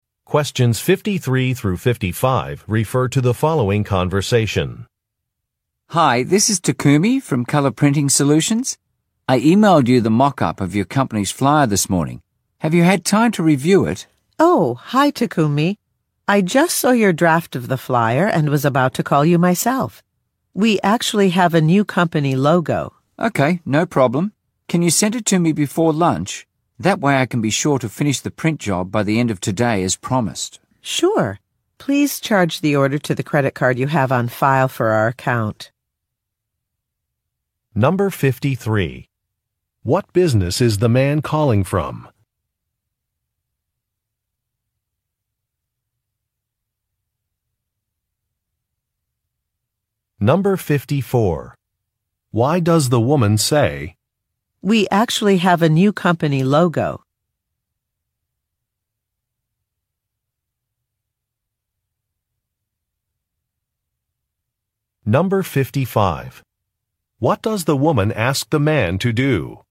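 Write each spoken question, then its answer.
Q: What business is the man calling from?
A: A printing company (Color Printing Solutions)

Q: What does the woman ask the man to do?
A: Charge the order to the credit card on file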